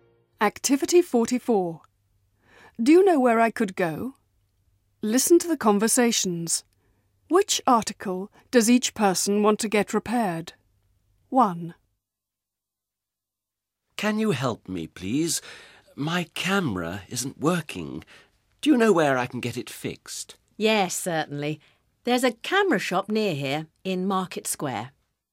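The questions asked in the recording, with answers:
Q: Which article does each person want to get repaired?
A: A camera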